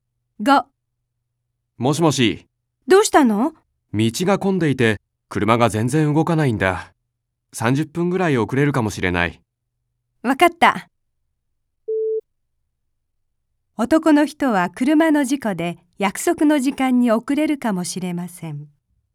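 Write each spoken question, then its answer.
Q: 男の人は車の事故で約束の時間に遅れるかもしれません。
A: ×(道が混んでいるから)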